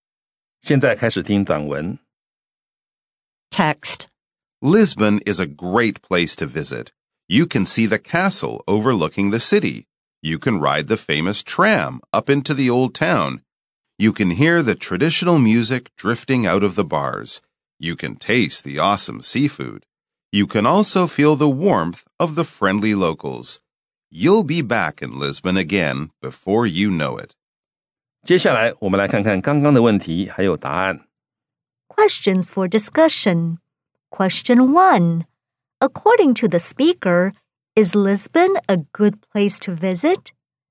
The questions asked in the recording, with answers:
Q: According to the speaker, is Lisbon a good place to visit?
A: Yes, Lisbon is a great place to visit.